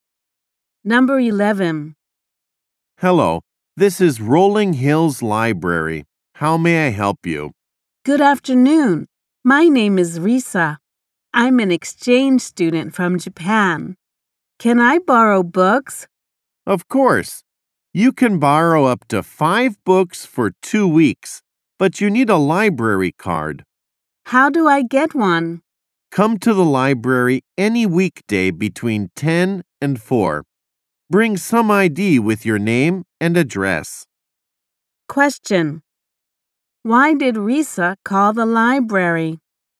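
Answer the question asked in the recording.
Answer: To ask if she could borrow books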